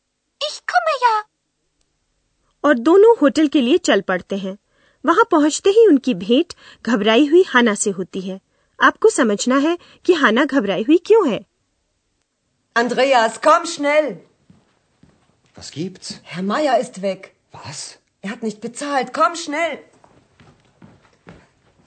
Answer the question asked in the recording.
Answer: शायद आप समझ गए होंगे कि हाना इसलिए घबराई हुई है कि श्री मायर नहीं है